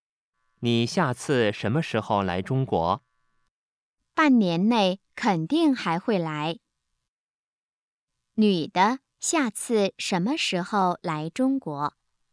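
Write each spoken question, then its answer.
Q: 女的下次什么时候来中国?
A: 半年内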